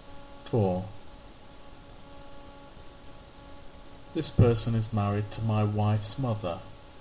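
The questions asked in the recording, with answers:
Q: This person is married to my wife's mother.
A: father-in-law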